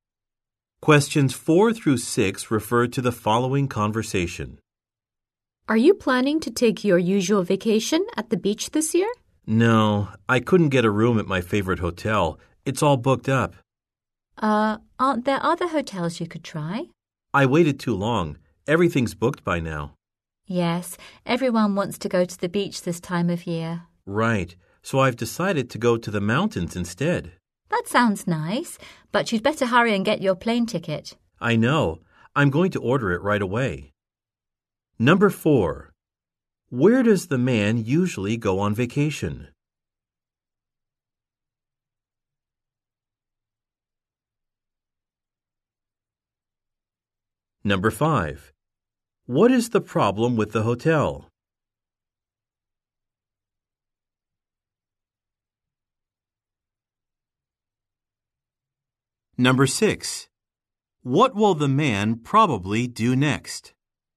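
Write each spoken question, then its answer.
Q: Where does the man usually go on vacation?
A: To the beach

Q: What is the problem with the hotel?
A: It's all booked up

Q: What will the man probably do next?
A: Order a plane ticket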